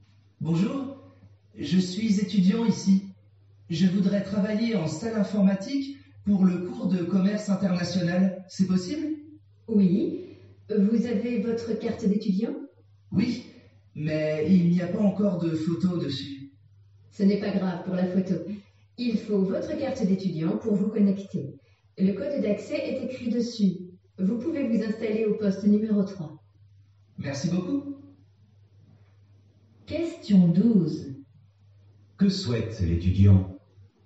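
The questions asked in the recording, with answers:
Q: Que souhaite l'étudiant?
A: Travailler en salle informatique pour le cours de commerce international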